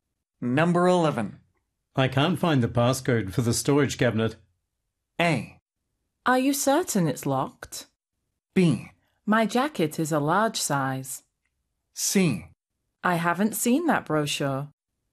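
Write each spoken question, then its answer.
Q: I can't find the passcode for the storage cabinet.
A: A: Are you certain it's locked?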